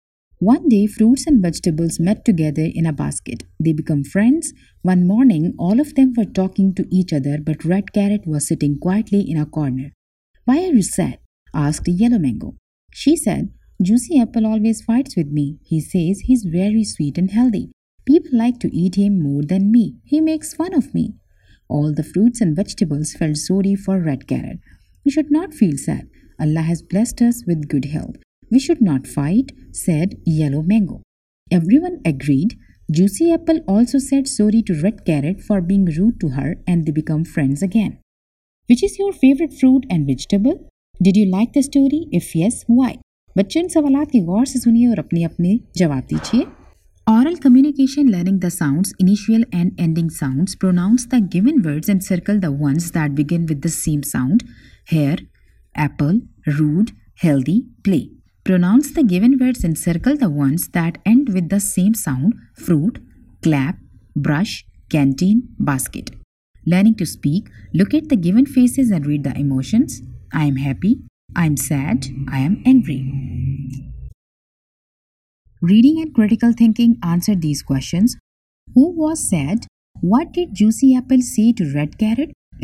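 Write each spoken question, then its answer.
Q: Who was sad?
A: Red Carrot

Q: What did Juicy Apple say to Red Carrot?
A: He says he's very sweet and healthy, and people like to eat him more than her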